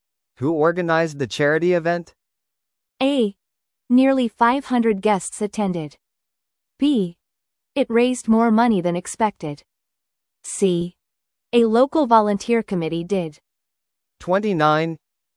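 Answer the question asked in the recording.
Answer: C: A local volunteer committee did.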